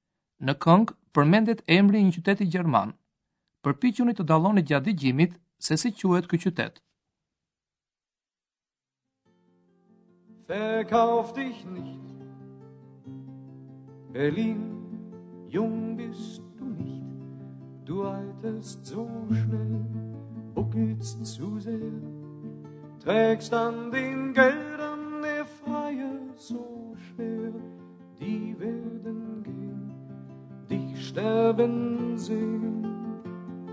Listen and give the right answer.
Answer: Berlin Berlin